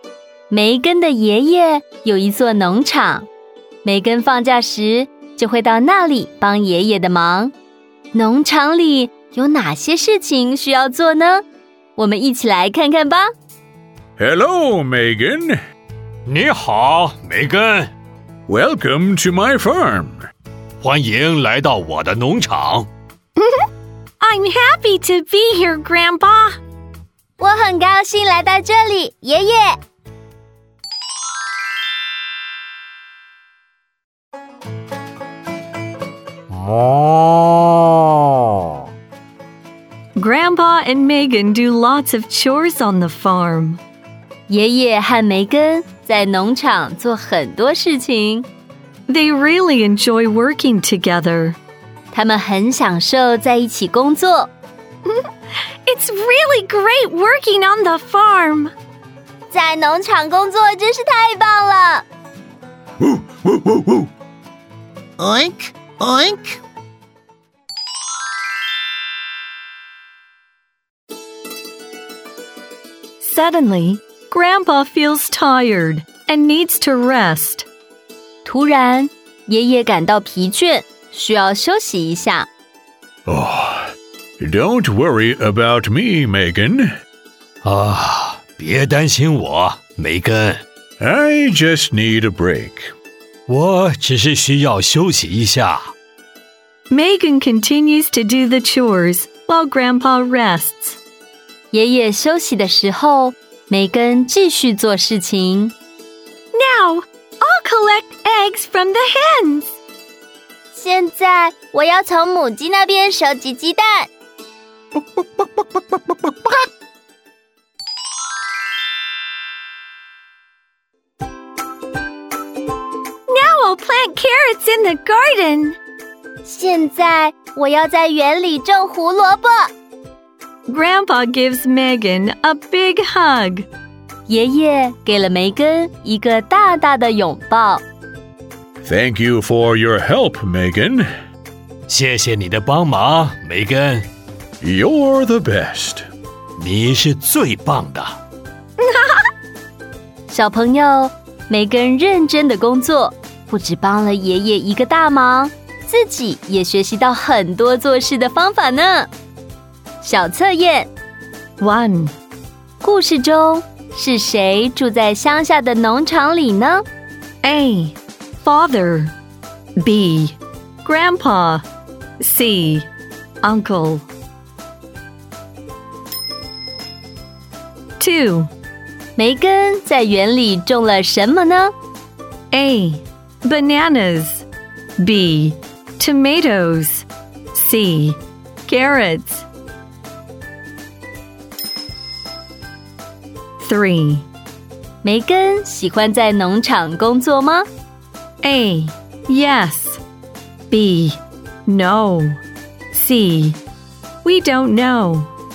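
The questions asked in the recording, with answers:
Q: 故事中是谁住在乡下的农场里呢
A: B: Grandpa

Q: 梅根在园里种了什么呢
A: C: Carrots

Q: 梅根喜欢在农场工作吗?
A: A: Yes.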